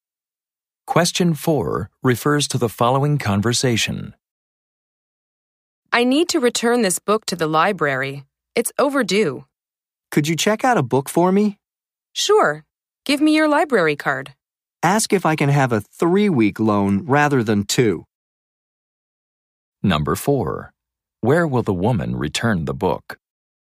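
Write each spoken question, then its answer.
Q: Where will the woman return the book?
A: To the library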